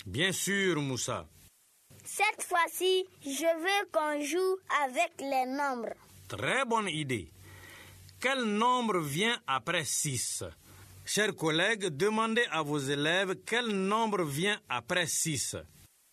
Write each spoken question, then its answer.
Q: Quel nombre vient après 6?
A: Monsieur, c'est 7.